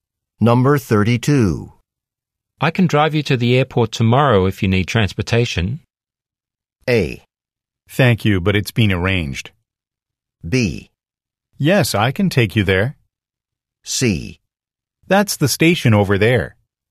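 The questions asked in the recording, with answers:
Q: I can drive you to the airport tomorrow if you need transportation.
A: A: Thank you, but it's been arranged.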